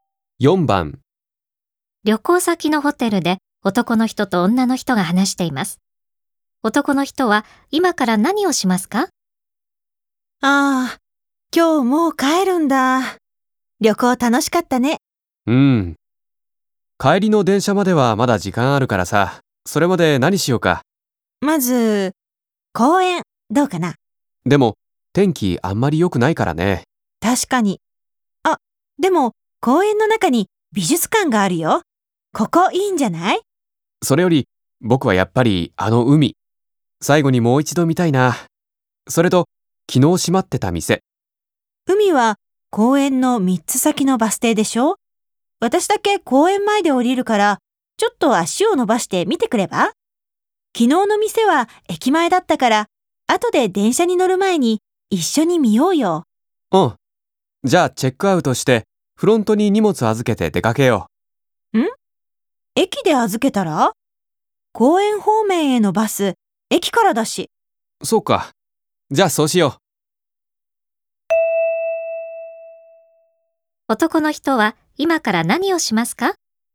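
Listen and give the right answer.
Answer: チェックアウトして、駅に荷物を預けに行く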